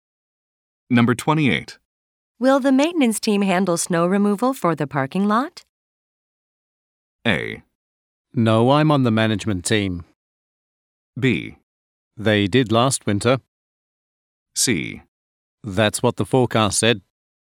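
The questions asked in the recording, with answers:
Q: Will the maintenance team handle snow removal for the parking lot?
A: B: They did last winter.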